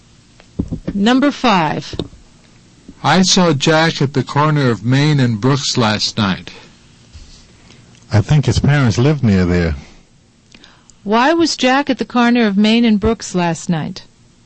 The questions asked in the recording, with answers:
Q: Why was Jack at the corner of Main and Brooks last night?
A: He could have been visiting his parents.